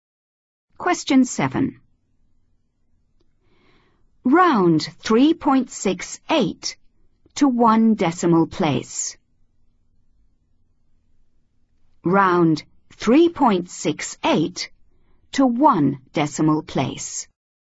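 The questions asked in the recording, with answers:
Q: Round 3.68 to one decimal place.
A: 3.7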